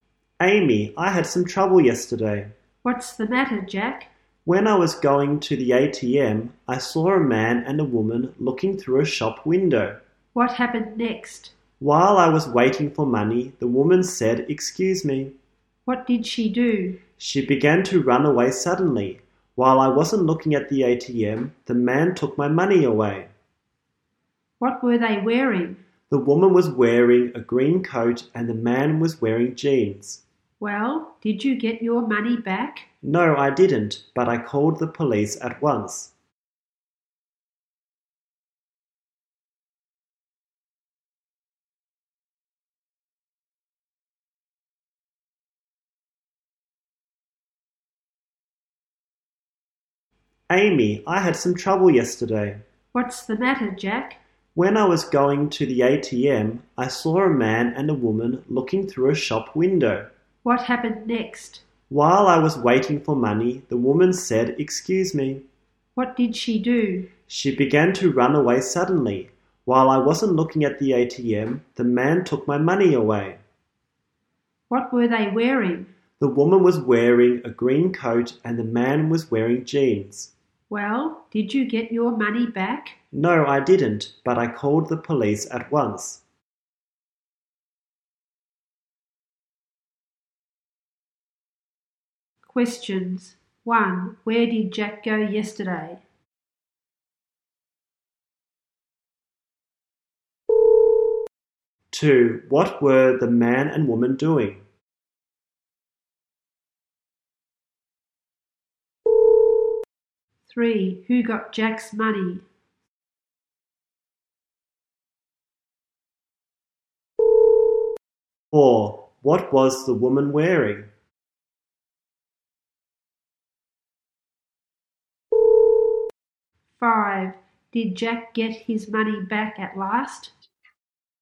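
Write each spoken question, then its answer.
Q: Where did Jack go yesterday?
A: To the ATM

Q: What were the man and woman doing?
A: Looking through a shop window

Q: Who got Jack's money?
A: The man

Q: What was the woman wearing?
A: A green coat

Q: Did Jack get his money back at last?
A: No, he didn't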